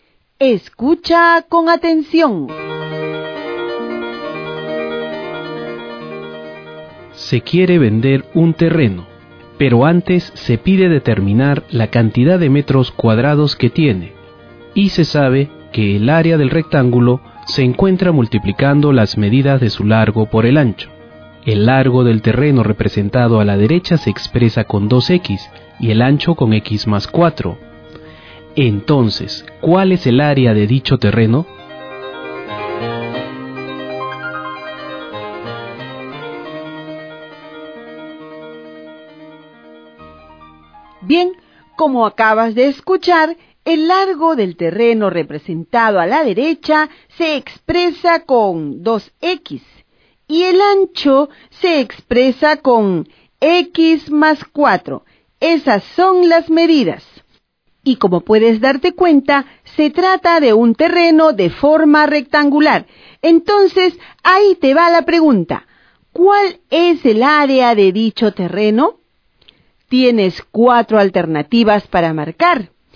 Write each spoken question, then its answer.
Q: Entonces, ¿cuál es el área de dicho terreno?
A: Esto quiere decir que el área del terreno es igual a 2x al cuadrado más 8x.